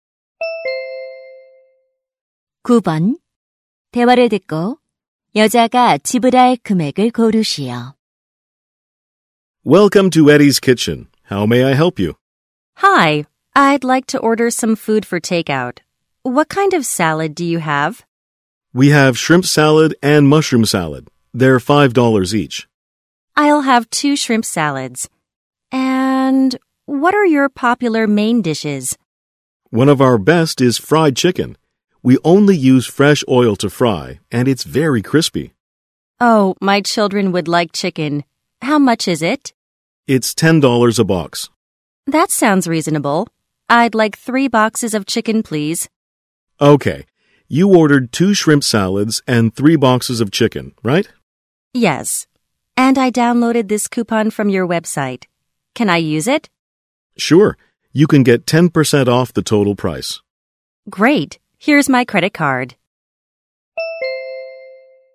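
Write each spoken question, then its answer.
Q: 대화를 듣고 여자가 지불할 금액을 고르시오.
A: $36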